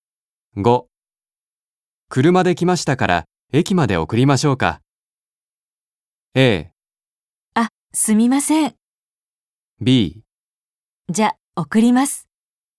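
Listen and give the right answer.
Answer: A: あ、すみません。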